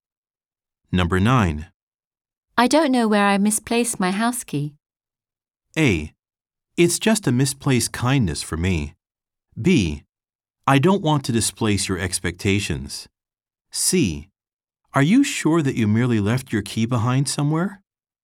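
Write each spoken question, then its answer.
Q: I don't know where I misplaced my house key.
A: C: Are you sure that you merely left your key behind somewhere?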